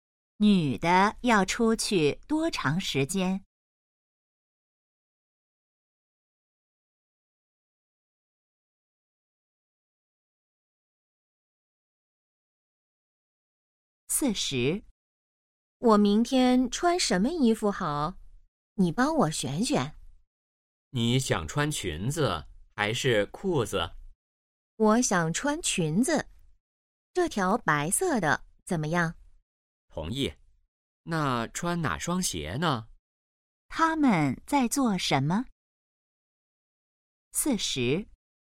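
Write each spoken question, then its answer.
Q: 他们在做什么?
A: 选衣服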